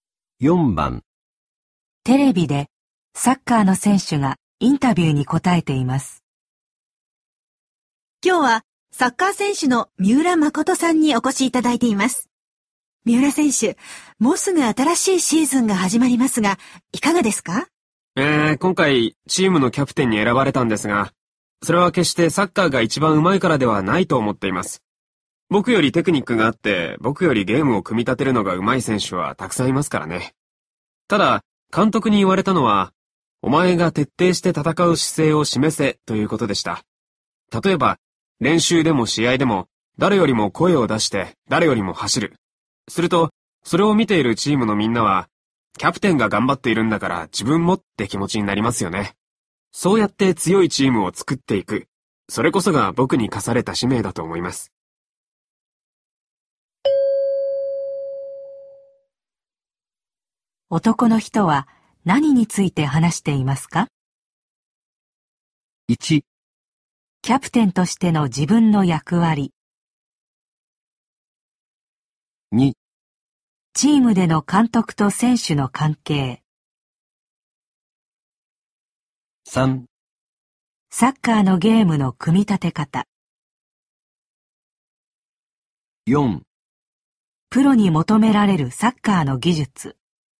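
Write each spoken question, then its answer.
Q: 男の人は何について話していますか?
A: 1: キャプテンとしての自分の役割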